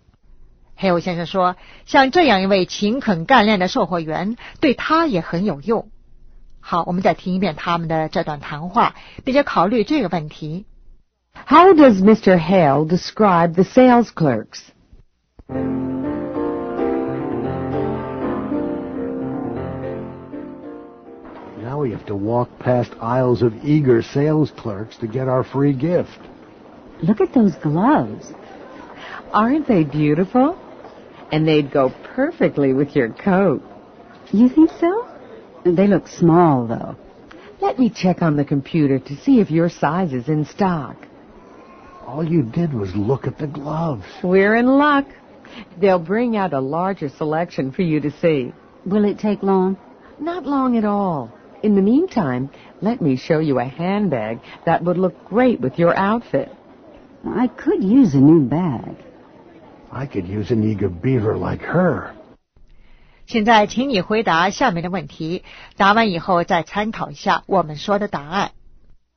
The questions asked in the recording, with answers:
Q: How does Mr. Hale describe the sales clerks?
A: As eager.